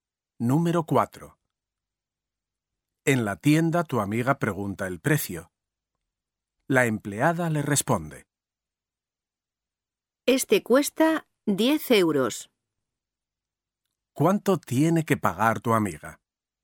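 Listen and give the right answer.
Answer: 10 euros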